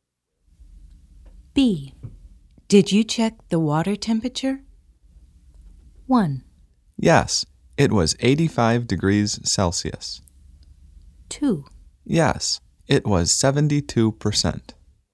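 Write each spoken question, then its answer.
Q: Did you check the water temperature?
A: 1: Yes, it was 85 degrees Celsius.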